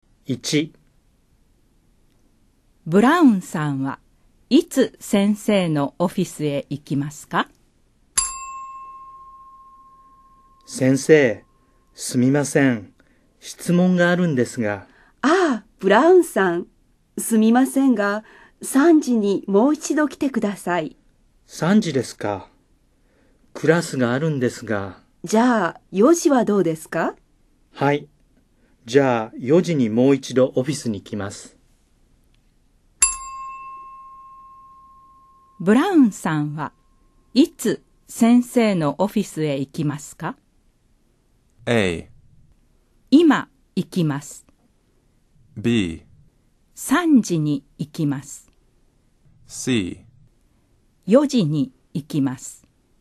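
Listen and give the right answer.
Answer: C: 4時に行きます。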